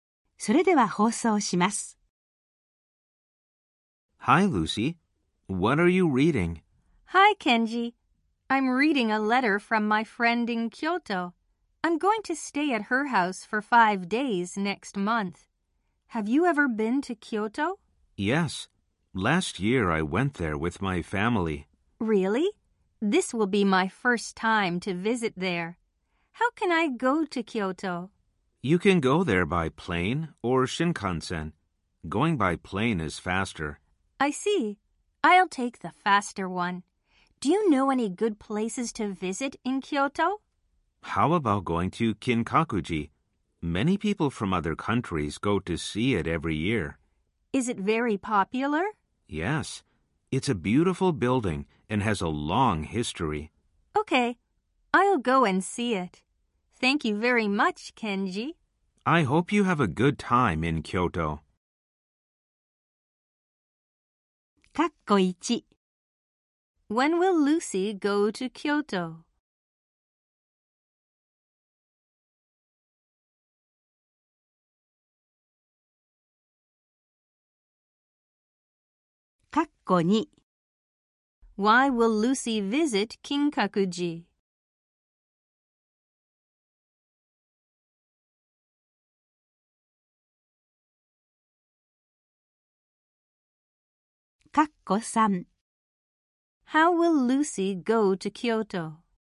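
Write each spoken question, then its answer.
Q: When will Lucy go to Kyoto?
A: Next month

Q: Why will Lucy visit Kinkakuji?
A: Because it's a beautiful building with a long history and very popular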